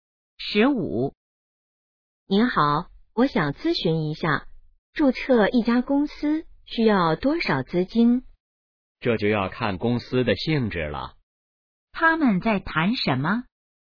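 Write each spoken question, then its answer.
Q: 他们在谈什么?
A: 注册公司需要多少资金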